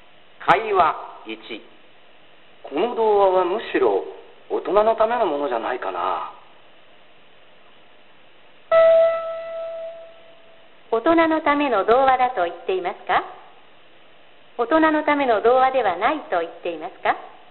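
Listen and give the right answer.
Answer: 大人のための童話だと言っています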